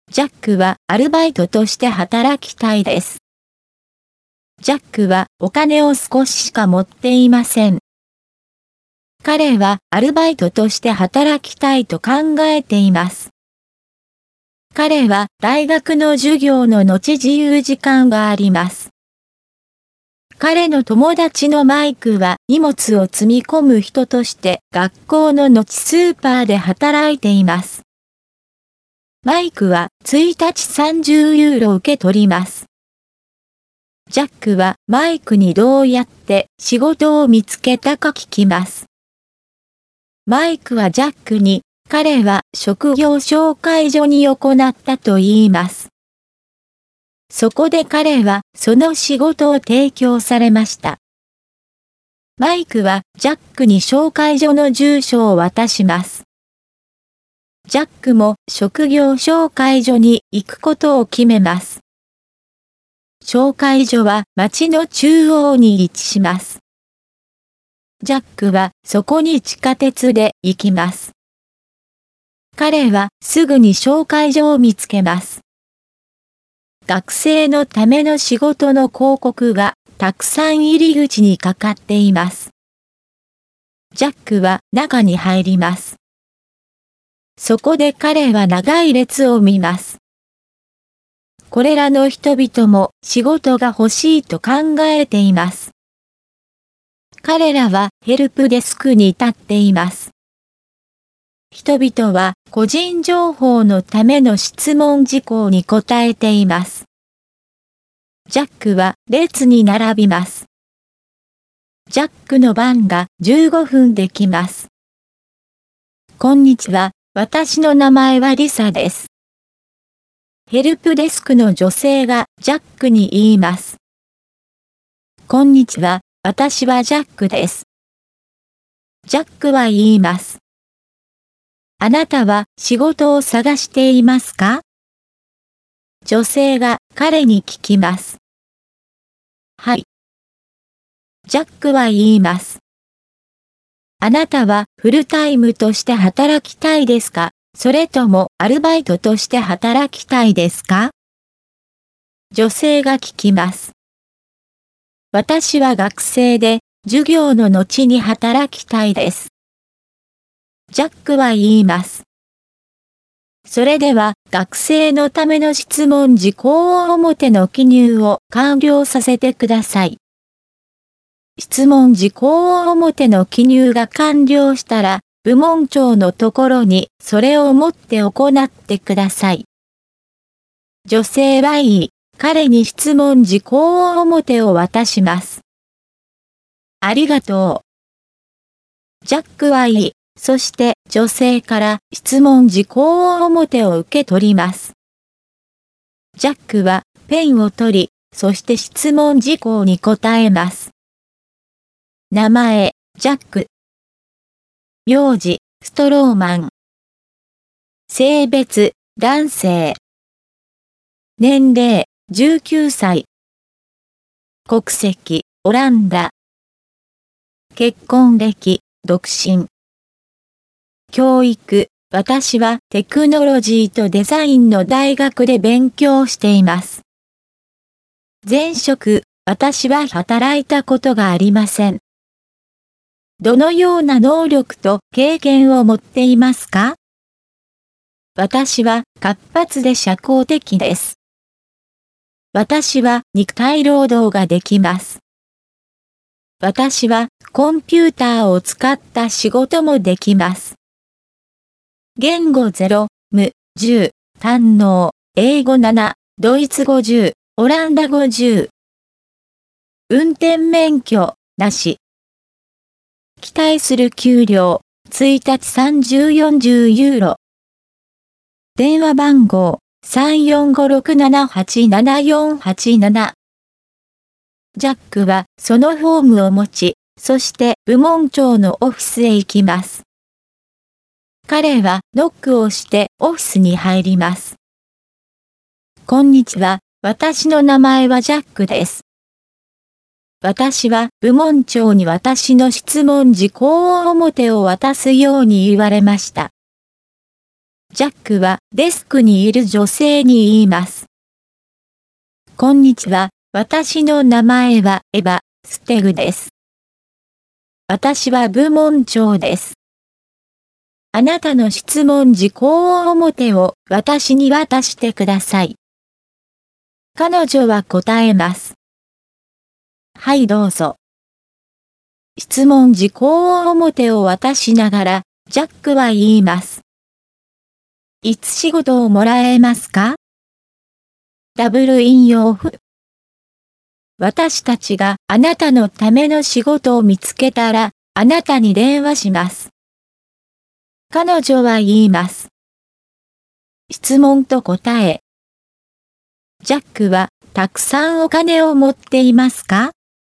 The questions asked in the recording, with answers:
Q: ジャックはたくさんお金を持っていますか?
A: いいえ、ジャックはお金を少ししか持っていません。